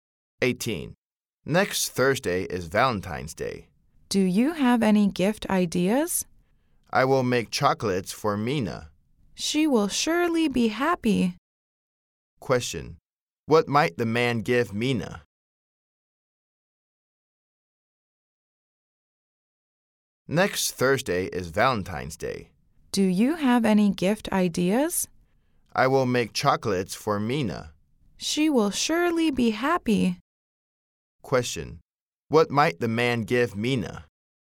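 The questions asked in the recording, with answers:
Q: Question: What might the man give Mina?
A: Chocolates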